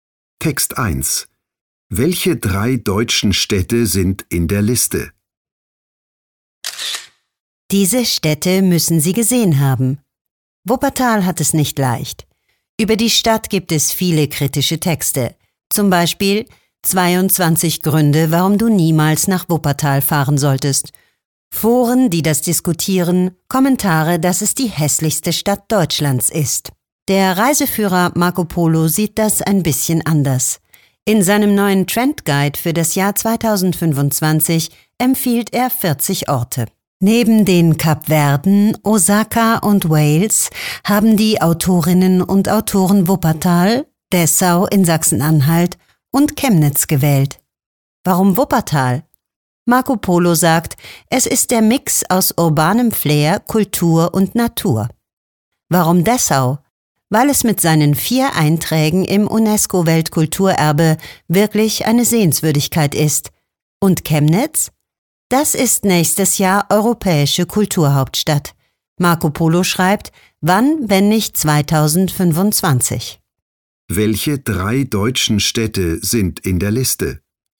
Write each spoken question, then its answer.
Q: Welche drei deutschen Städte sind in der Liste?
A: Wuppertal, Dessau und Chemnitz sind auf der Liste im Marco Polo Trend Guide 2025.